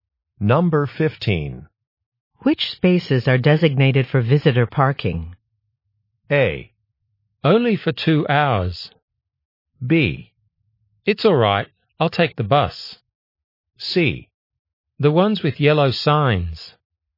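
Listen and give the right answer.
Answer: C: The ones with yellow signs.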